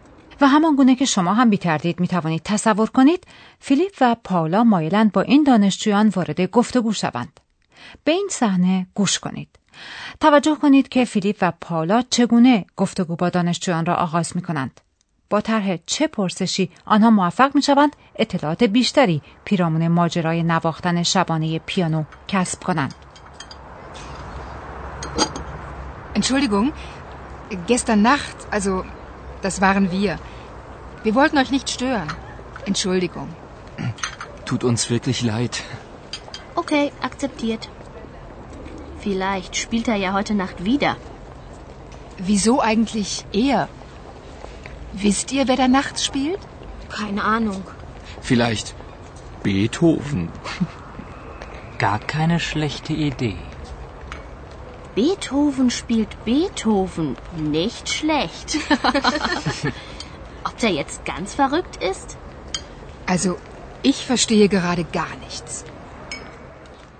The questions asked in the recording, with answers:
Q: توجه کنید که فیلیپ و پاولا چگونه گفتگو با دانشجویان را آغاز می کنند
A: در ابتدا فیلیپ و پاولا بیان می کنند که کسانی که دیشب مزاحم شنیدن موسیقی آنها شدند خود آنها بودند.